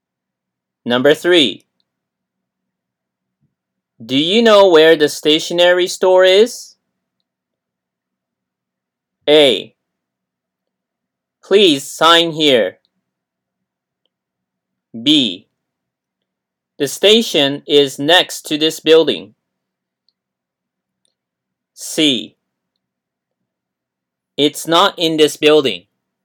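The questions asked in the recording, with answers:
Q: Do you know where the stationery store is?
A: C: It's not in this building.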